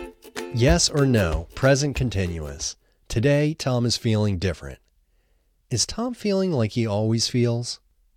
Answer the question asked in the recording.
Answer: No, Tom isn't feeling like he always feels.